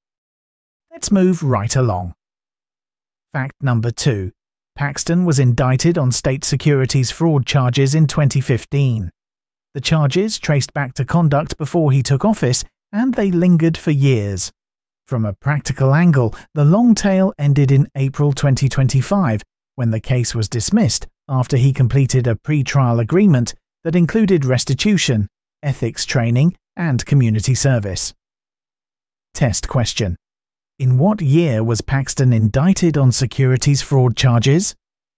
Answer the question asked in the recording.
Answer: Correct answer, 2015.